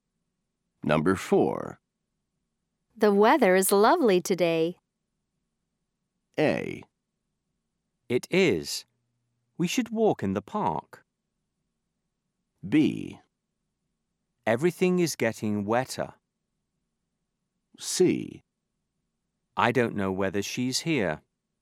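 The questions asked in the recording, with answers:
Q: The weather is lovely today.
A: A: It is. We should walk in the park.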